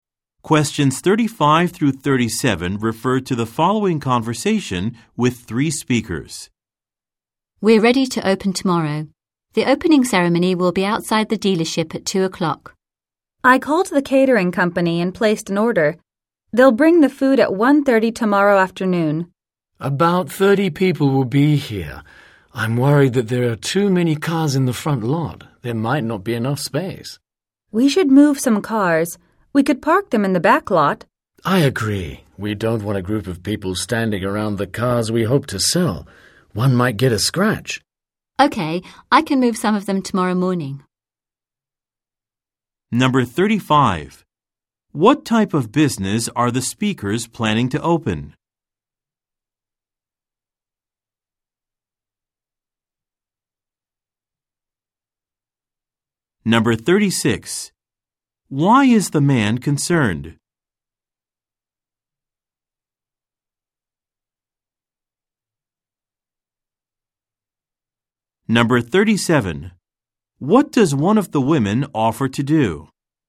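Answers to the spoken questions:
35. A car dealership
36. There are too many cars in the front lot, so there might not be enough space
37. Move some of the cars tomorrow morning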